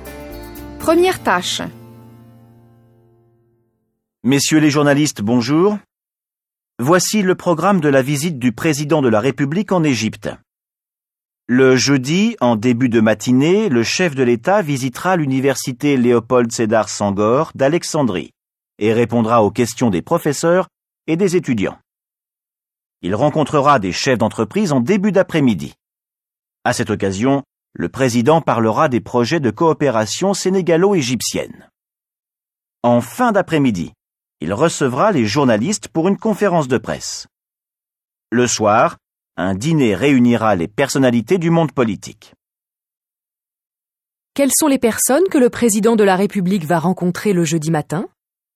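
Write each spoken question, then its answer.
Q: Quelles sont les personnes que le président de la République va rencontrer le jeudi matin ?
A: Les professeurs et les étudiants de l'université Léopold Sédar Senghor d'Alexandrie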